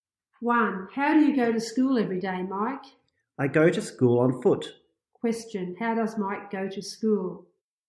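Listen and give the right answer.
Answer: On foot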